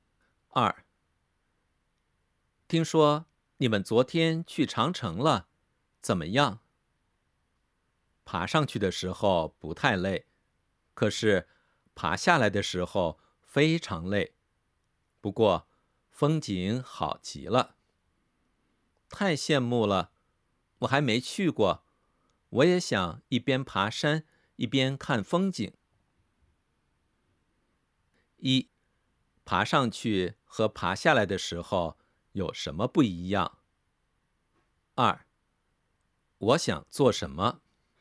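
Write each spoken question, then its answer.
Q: 爬上去和爬下来的时候有什么不一样?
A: 爬上去的时候不太累,爬下来的时候非常累

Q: 我想做什么?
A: 去长城,一边爬山一边看风景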